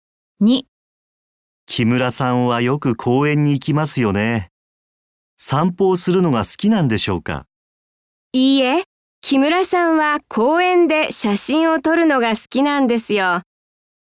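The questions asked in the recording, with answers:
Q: 木村さんはよく公園に行きますよね。散歩をするのが好きなんでしょうか?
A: いいえ、公園で写真を撮るのが好きです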